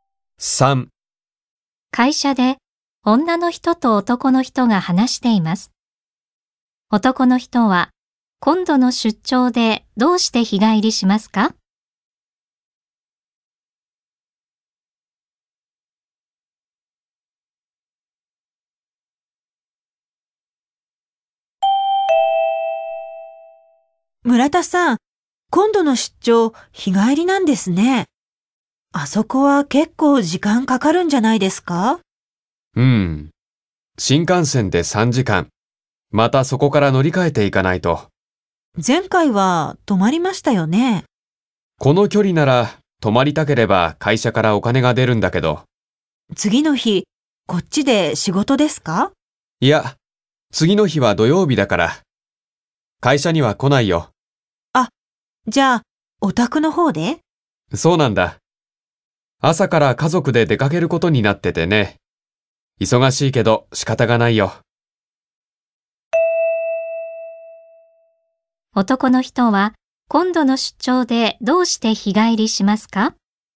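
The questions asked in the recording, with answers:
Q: 男の人は今度の出張でどうして日帰りしますか?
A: 次の日の朝から家族で出かけるから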